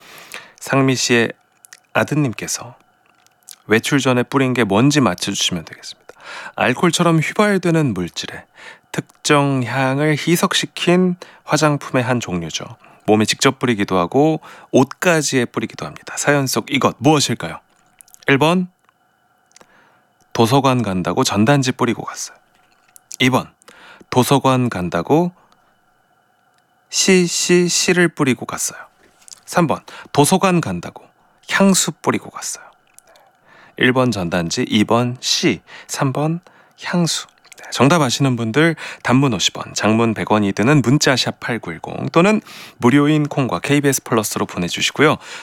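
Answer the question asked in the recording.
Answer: 3번: 도서관 간다고 향수 뿌리고 갔어요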